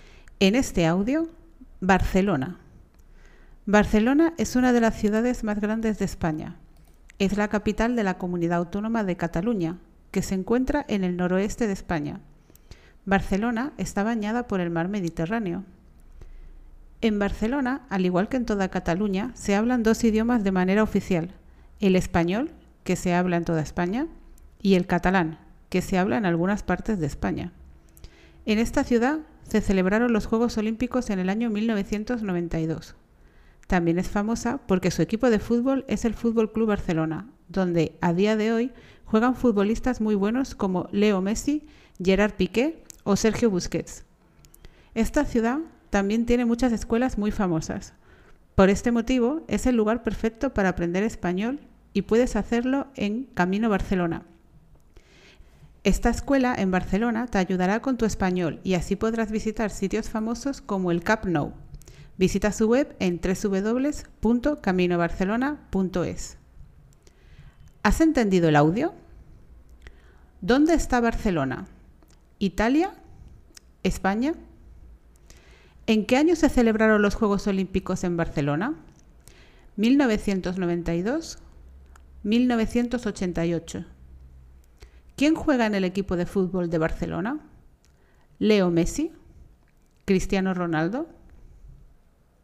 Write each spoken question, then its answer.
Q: ¿Dónde está Barcelona?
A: España

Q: ¿En qué año se celebraron los Juegos Olímpicos en Barcelona?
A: 1992

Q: ¿Quién juega en el equipo de fútbol de Barcelona?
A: Leo Messi